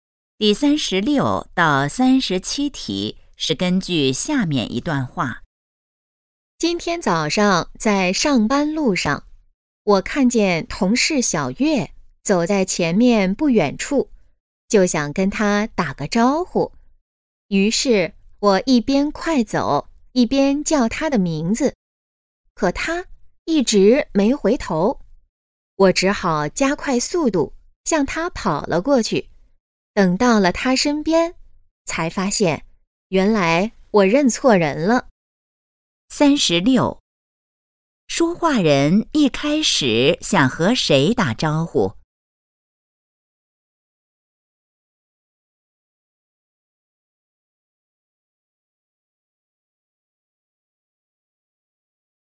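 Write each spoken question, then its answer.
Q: 说话人一开始想和谁打招呼?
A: 同事小月

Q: 说话人怎么了?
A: 认错人了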